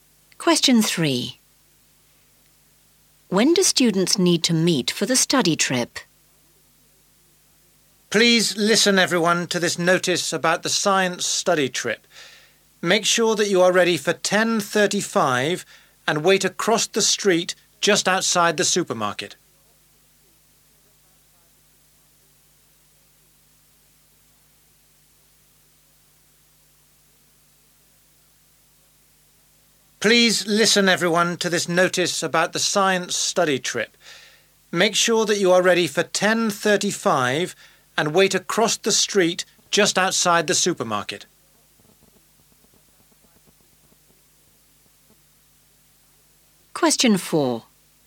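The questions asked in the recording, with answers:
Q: When do students need to meet for the study trip?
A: 10:35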